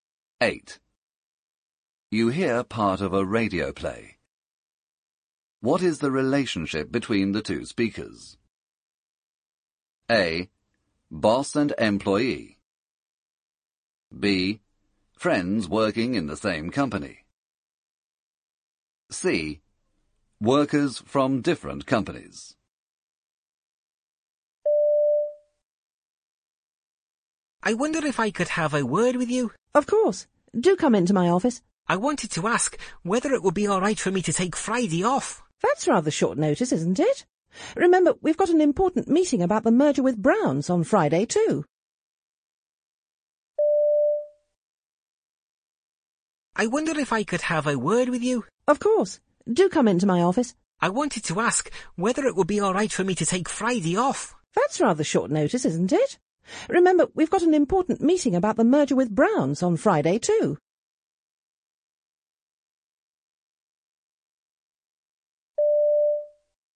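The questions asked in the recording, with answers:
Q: What is the relationship between the two speakers?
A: A: Boss and employee.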